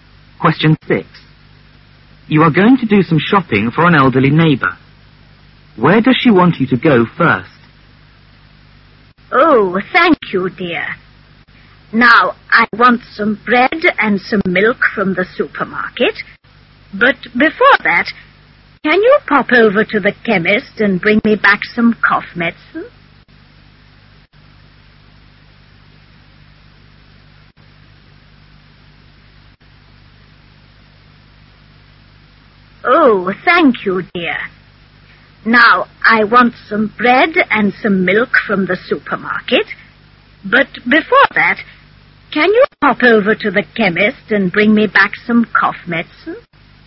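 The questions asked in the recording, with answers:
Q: Where does she want you to go first?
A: To the chemist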